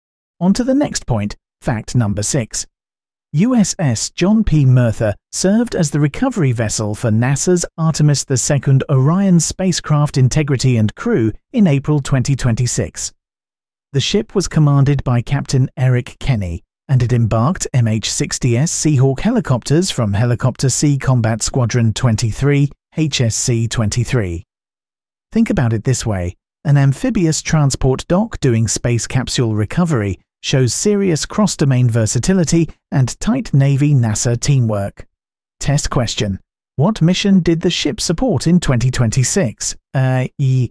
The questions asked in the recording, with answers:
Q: What mission did the ship support in 2026?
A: Correct answer, Artemis II.